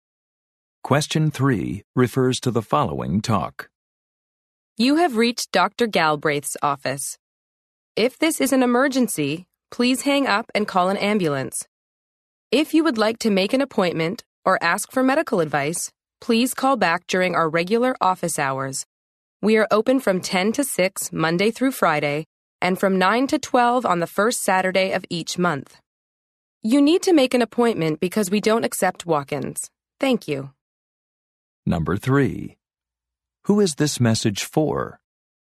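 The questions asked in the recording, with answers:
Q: Who is this message for?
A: Patients calling the doctor's office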